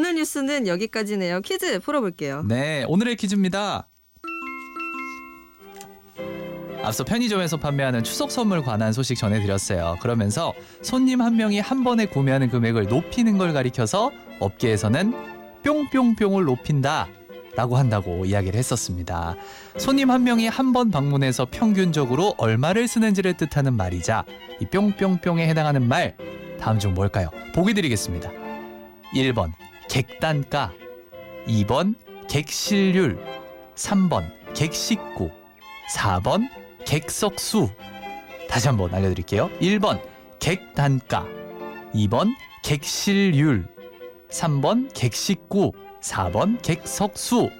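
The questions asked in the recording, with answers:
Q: 손님 한 명이 한 번 방문해서 평균적으로 얼마를 쓰는지를 뜻하는 말이자 이 뿅뿅뿅에 해당하는 말 다음 중 뭘까요?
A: 1: 객단가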